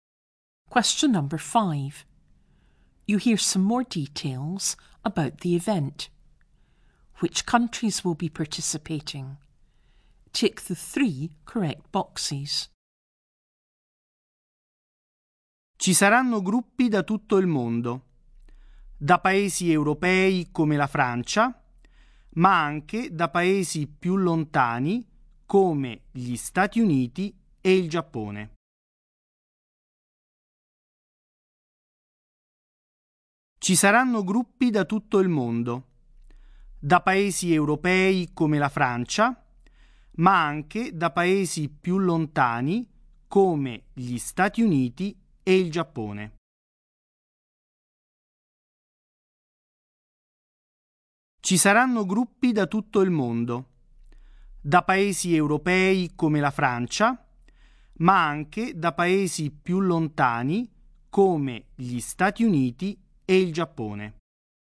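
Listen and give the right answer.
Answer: France, the United States and Japan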